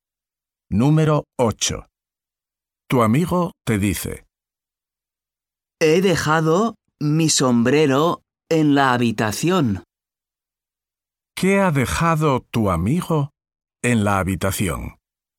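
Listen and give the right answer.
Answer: Su sombrero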